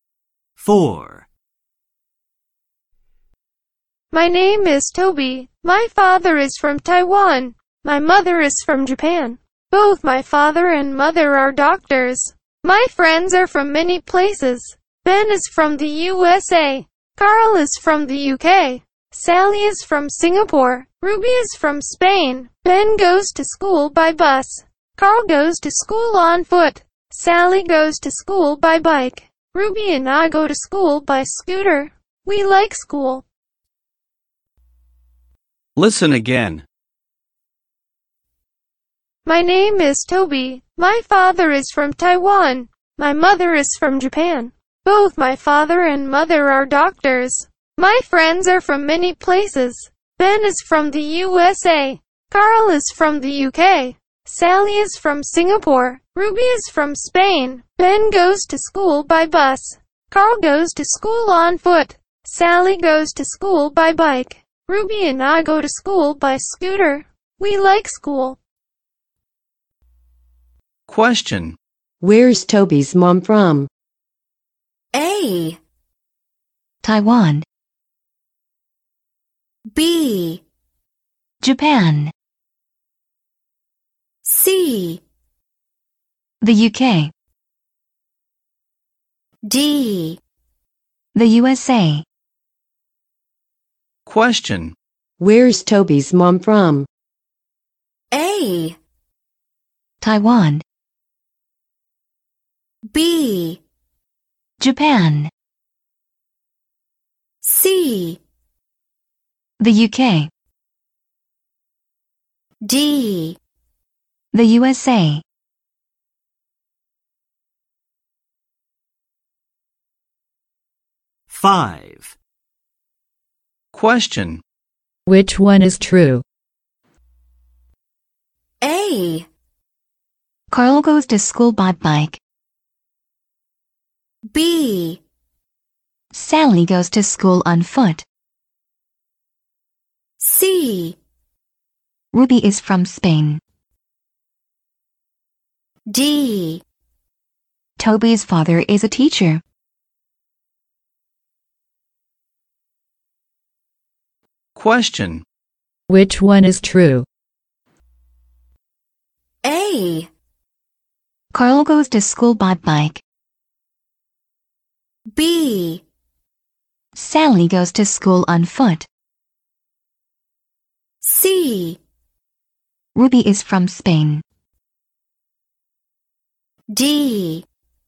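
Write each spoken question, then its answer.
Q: Where's Toby's mom from?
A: B: Japan.

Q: Which one is true?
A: C: Ruby is from Spain.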